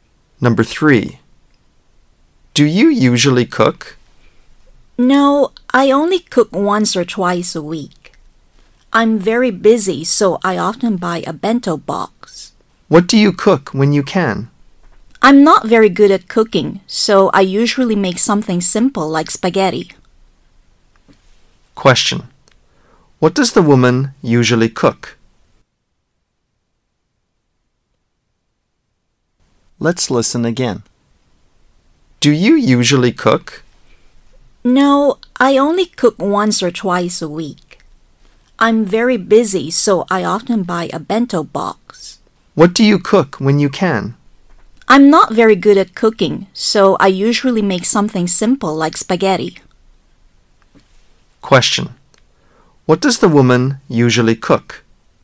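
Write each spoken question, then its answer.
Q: What does the woman usually cook?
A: Something simple like spaghetti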